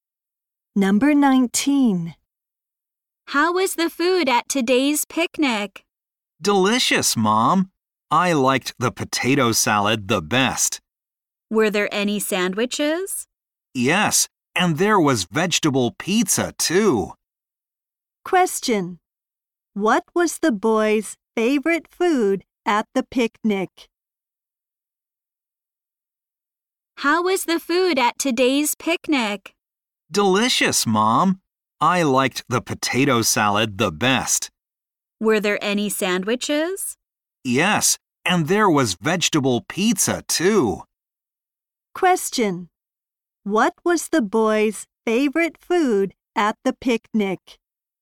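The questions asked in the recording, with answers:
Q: What was the boy's favorite food at the picnic?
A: The potato salad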